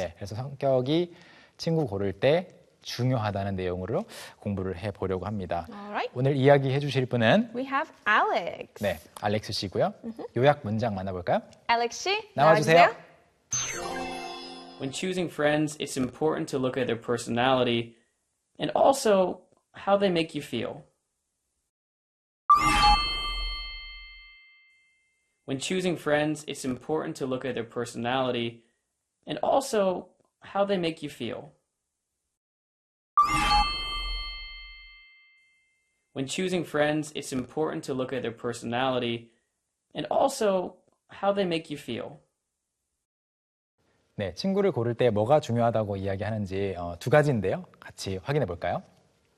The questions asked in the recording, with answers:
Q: 네, 친구를 고를 때 뭐가 중요하다고 이야기하는지 두 가지인데요.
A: Personality 하고 how they make you feel.